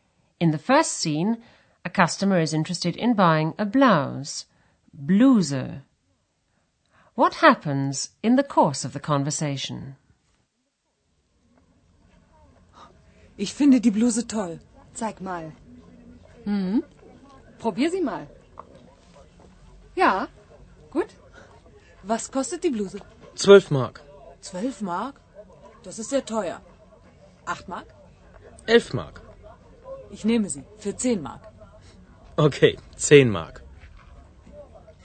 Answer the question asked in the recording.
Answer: The customer strikes a compromise and says she'll take it for 10 marks.